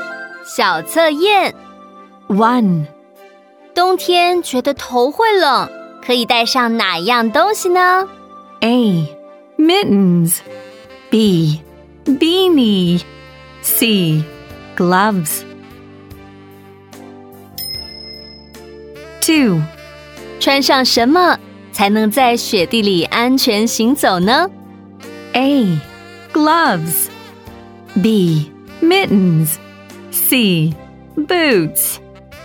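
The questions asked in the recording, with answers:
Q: 冬天觉得头会冷可以带上哪样东西呢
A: B: Beanie

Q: 穿上什么才能在雪地里安全行走呢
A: C: Boots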